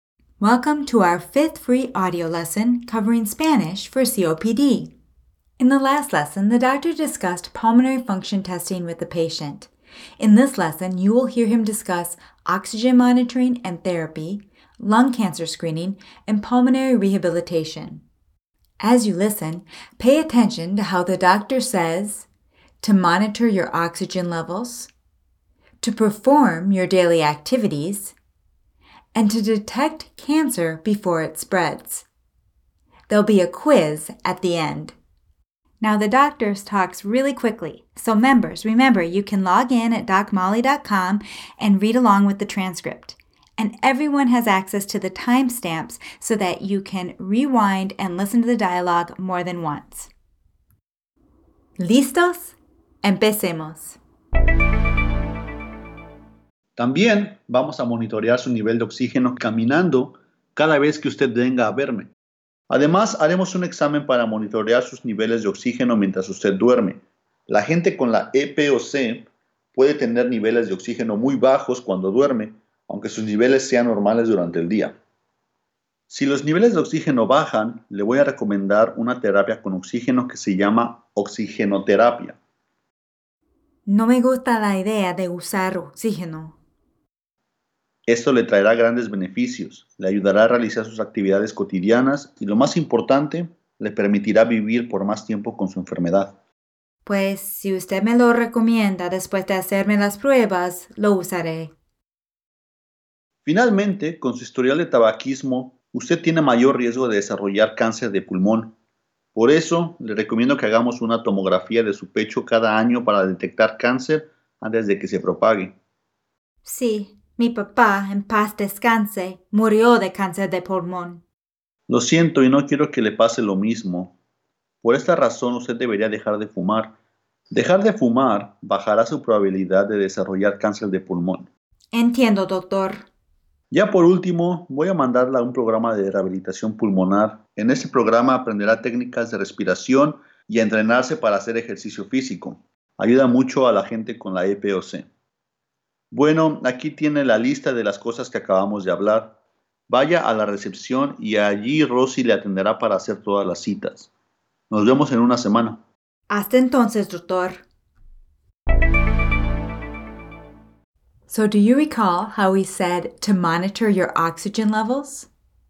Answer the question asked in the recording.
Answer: Monitorear sus niveles de oxígeno.